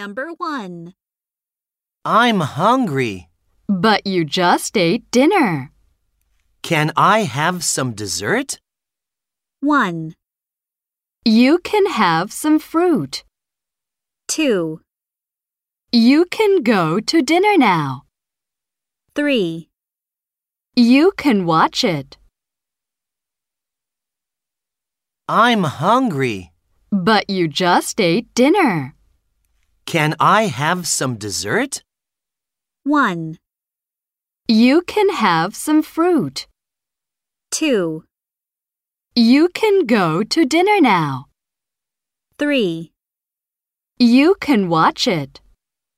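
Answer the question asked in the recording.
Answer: 1: You can have some fruit.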